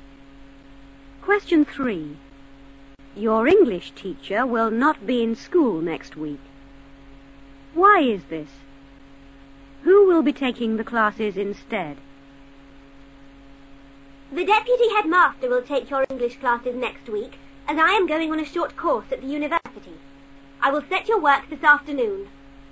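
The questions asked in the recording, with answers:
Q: Why is this?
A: She is going on a short course at the university

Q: Who will be taking the classes instead?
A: The deputy headmaster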